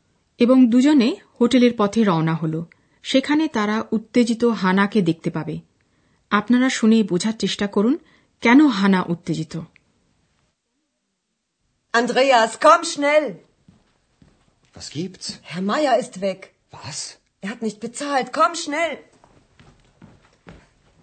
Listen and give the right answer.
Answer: হানা উত্তেজিত কারণ হ্যার মায়ার চলে গেছেন